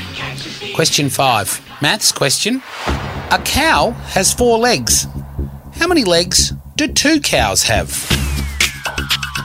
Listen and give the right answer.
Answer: The correct answer is eight, because two times four is eight.